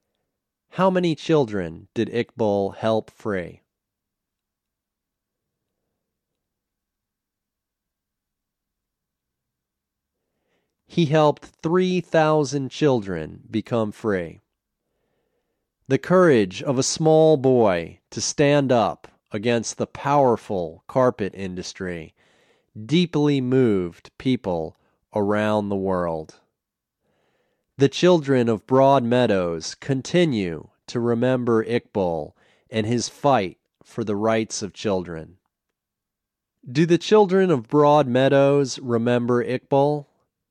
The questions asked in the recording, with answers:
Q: Do the children of Broad Meadows remember Iqbal?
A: Yes, the children of Broad Meadows remember Iqbal.